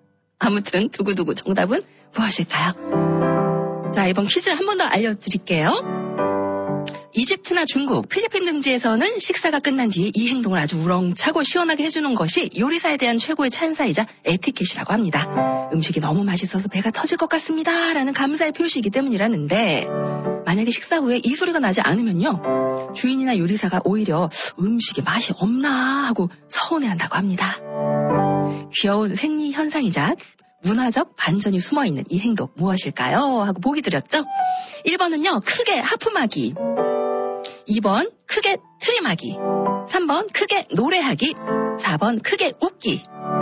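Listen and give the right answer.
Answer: 2: 크게 트림하기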